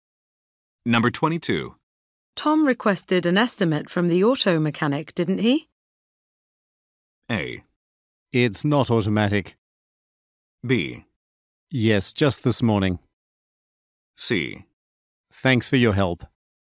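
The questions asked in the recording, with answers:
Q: Tom requested an estimate from the auto mechanic, didn't he?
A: B: Yes, just this morning.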